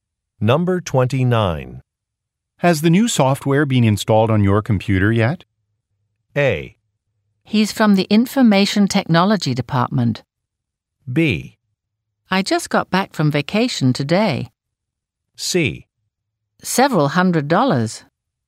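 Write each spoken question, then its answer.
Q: Has the new software been installed on your computer yet?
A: B: I just got back from vacation today.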